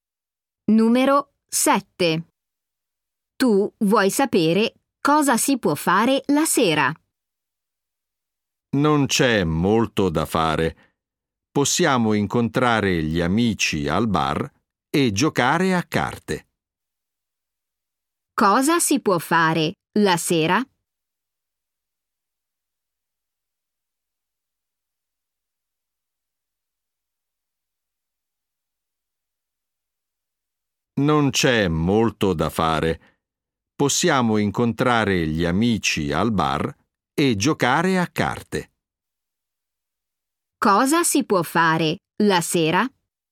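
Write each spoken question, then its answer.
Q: Cosa si può fare la sera?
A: Incontrare gli amici al bar e giocare a carte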